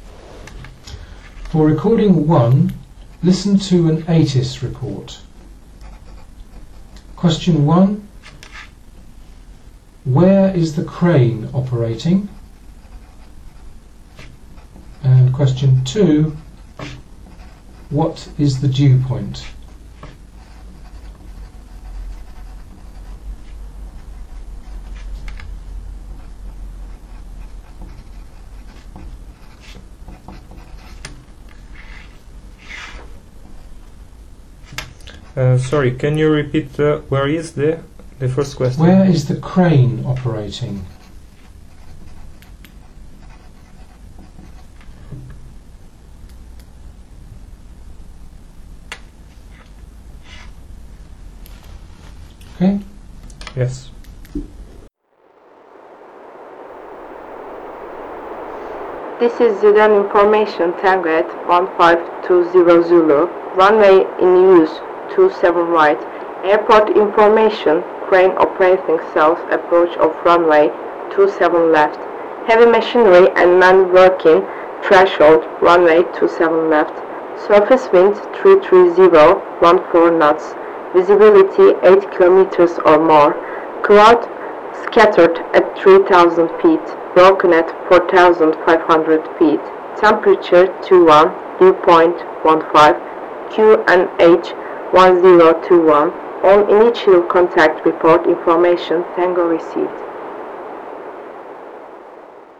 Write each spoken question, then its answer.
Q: where is the crane operating?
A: The crane operating is 27 left

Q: what is the dew point?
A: the temperature dew point is 15 degrees, 15.